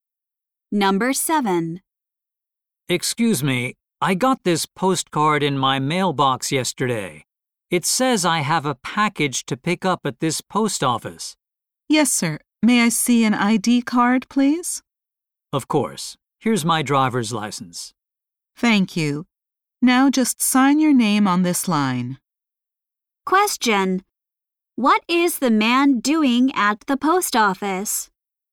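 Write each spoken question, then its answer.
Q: What is the man doing at the post office?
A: Picking up a package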